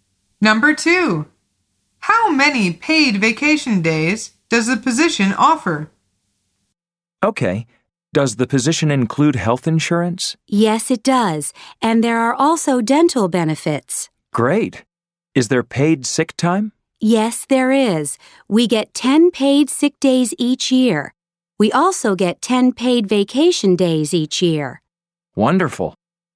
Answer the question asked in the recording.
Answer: The answer is 10.